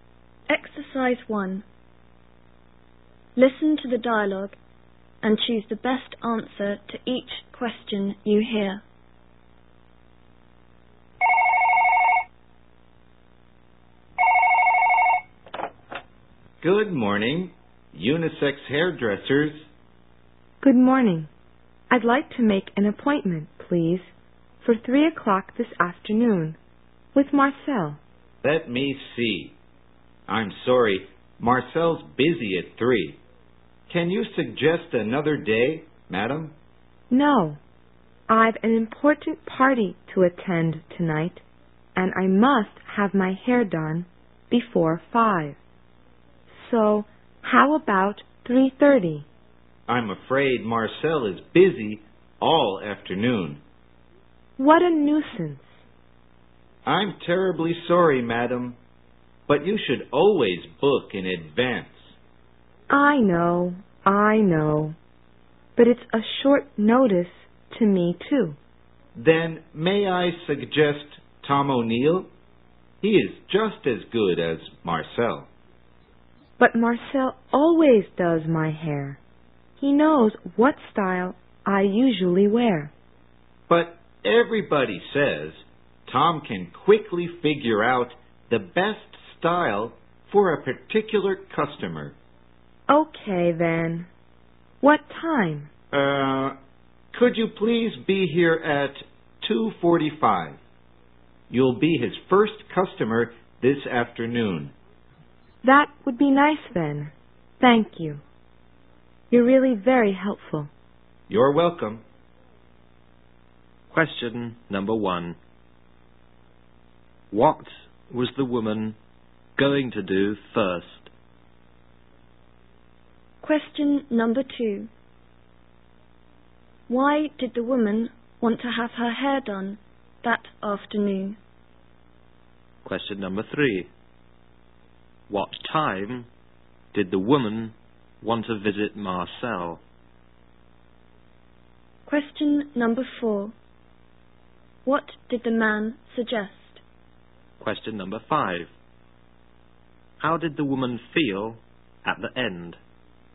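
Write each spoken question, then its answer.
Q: Why did the woman want to have her hair done that afternoon?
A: She had an important party to attend that night

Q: What time did the woman want to visit Marcel?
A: 3:00

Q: What did the man suggest?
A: Having Tom O'Neill do her hair at 2:45

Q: How did the woman feel at the end?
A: Pleased and grateful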